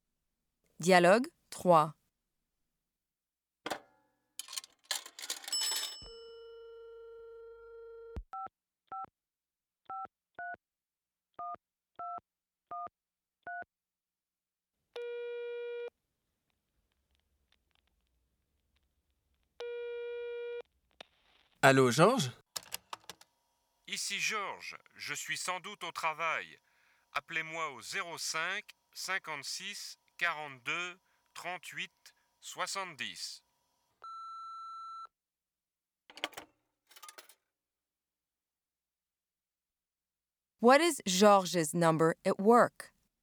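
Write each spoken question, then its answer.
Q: What is Georges' number at work?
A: 05 56 42 38 70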